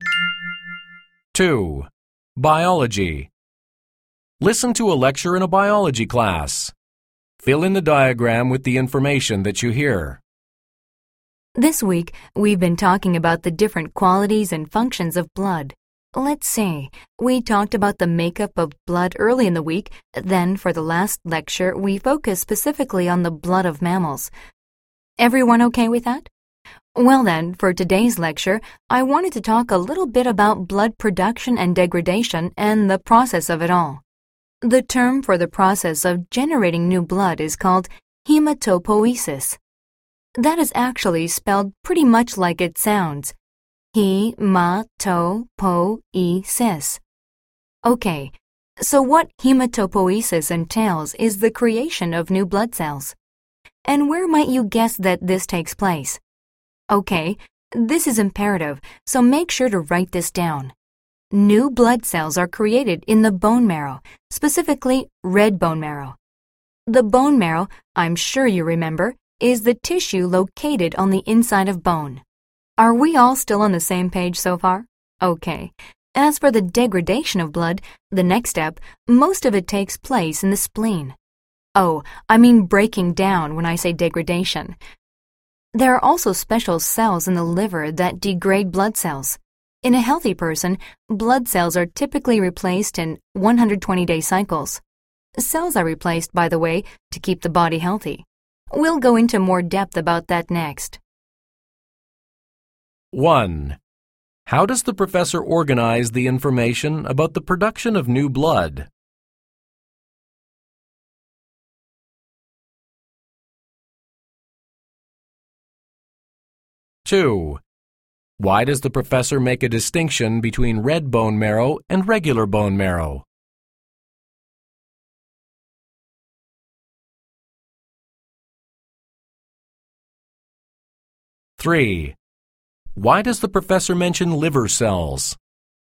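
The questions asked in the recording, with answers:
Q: Why does the professor mention liver cells?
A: Because special cells in the liver also break down blood cells, along with the spleen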